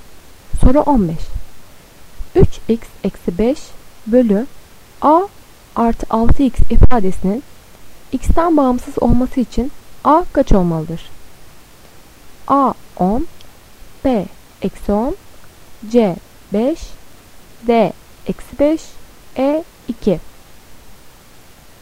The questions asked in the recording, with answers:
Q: 3x eksi 5 bölü a artı 6x ifadesinin x'ten bağımsız olması için a kaç olmalıdır?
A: Doğru cevap B eksi 10.